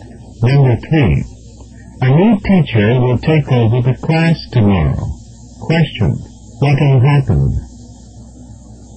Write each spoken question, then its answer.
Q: What will happen?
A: He'll assume control of the class.